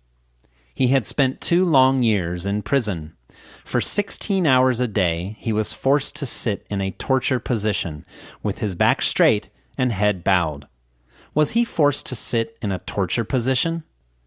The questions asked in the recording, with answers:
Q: Was he forced to sit in a torture position?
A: Yes, he was forced to sit in a torture position.